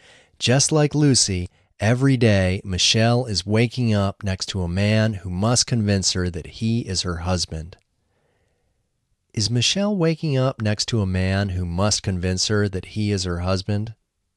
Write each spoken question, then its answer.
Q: Is Michelle waking up next to a man who must convince her that he is her husband?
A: Yes, she is waking up next to a man who must convince her that he is her husband.